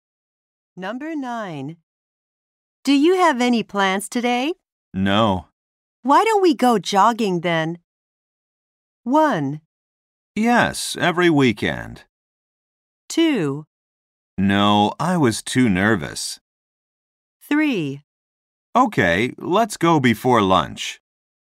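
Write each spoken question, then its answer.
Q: Why don't we go jogging then?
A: 3: Okay, let's go before lunch.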